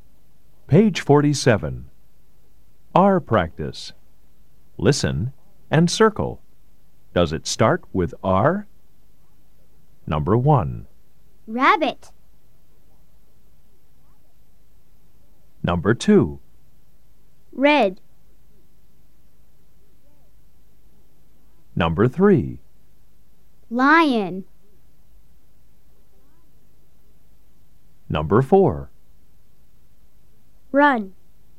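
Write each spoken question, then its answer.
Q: Rabbit.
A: Yes

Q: Lion.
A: No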